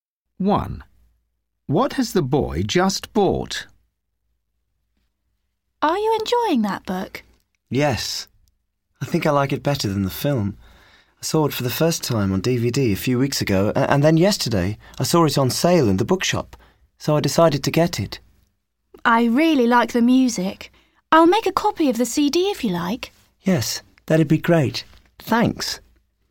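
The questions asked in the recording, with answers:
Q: What has the boy just bought?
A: the book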